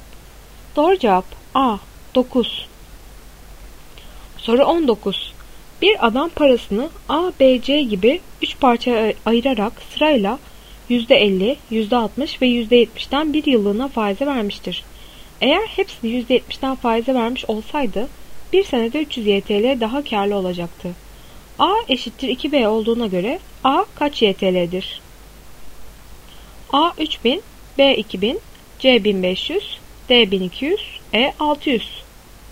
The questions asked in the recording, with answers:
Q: A eşittir 2B olduğuna göre A kaç YTL'dir?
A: Doğru cevap D 1200.